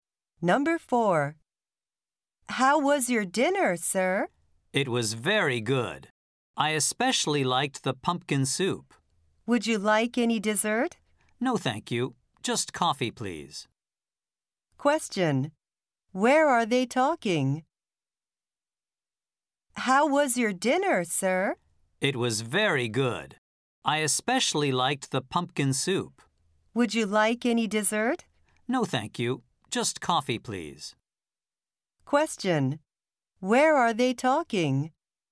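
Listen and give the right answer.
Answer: At a restaurant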